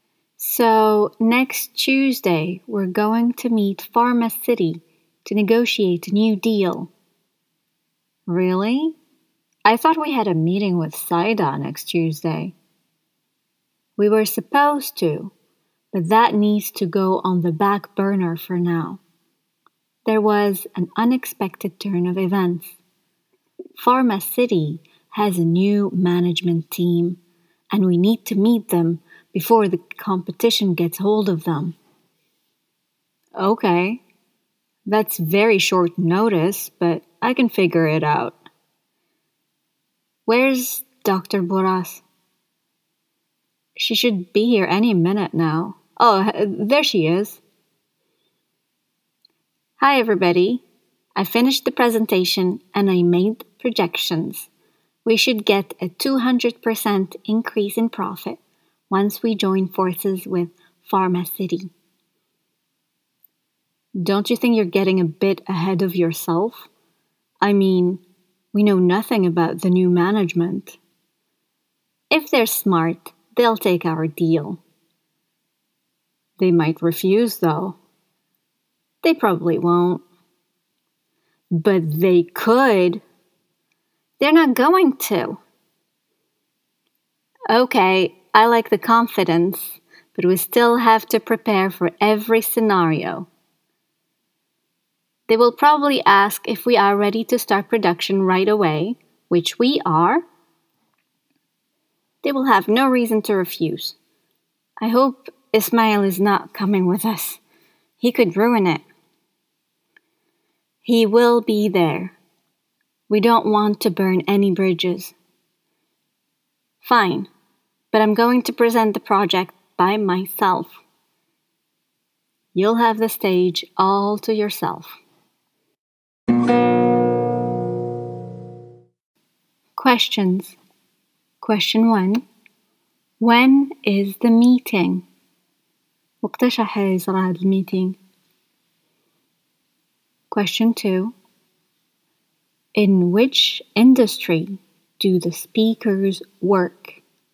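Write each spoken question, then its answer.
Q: When is the meeting?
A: Next Tuesday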